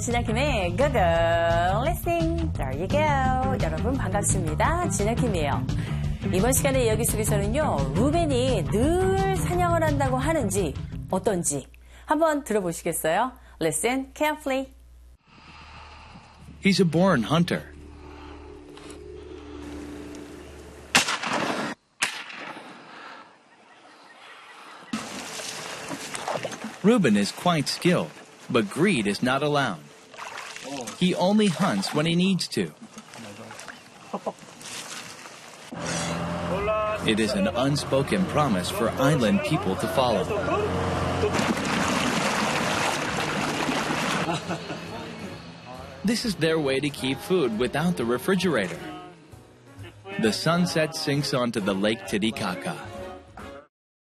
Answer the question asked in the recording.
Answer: He hunts when he needs to.